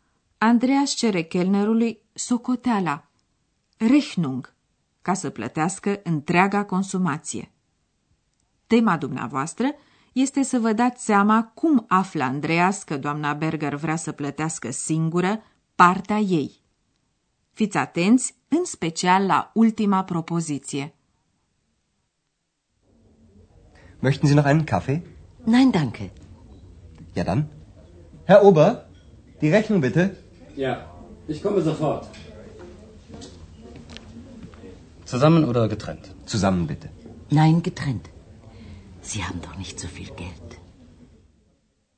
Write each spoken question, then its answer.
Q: Tema dumneavoastră este să vă dați seama cum află Andreas că doamna Berger vrea să plătească singură partea ei.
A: Doamna Berger vrea să plătească singură ceea ce a consumat ea